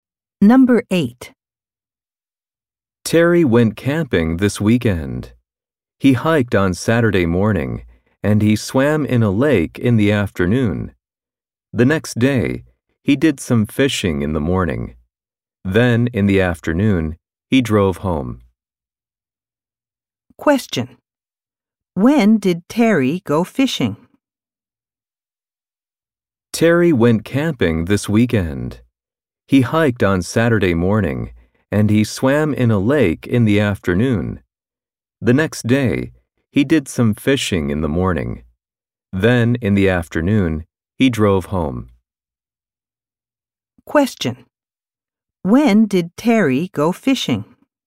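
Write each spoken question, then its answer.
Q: When did Terry go fishing?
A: On Sunday morning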